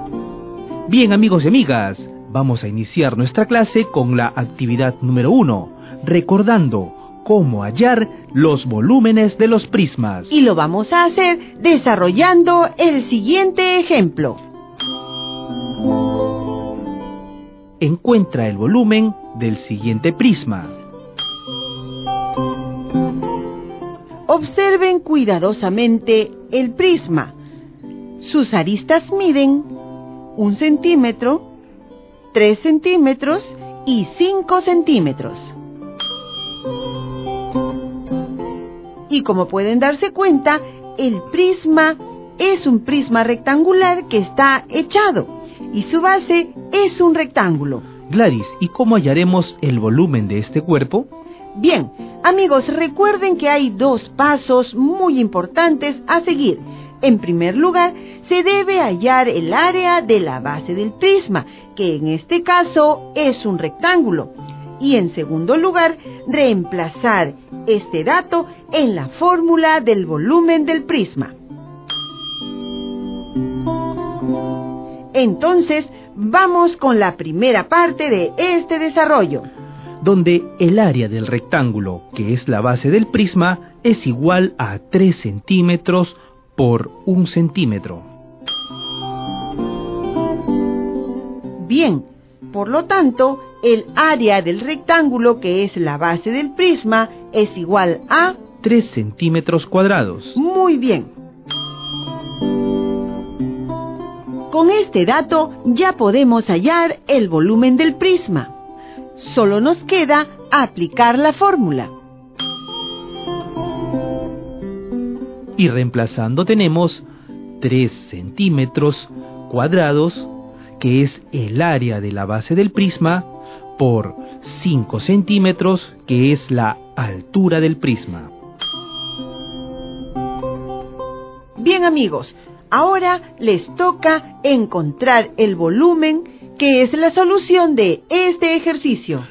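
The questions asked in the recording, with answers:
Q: Encuentra el volumen del siguiente prisma.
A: 15 centímetros cúbicos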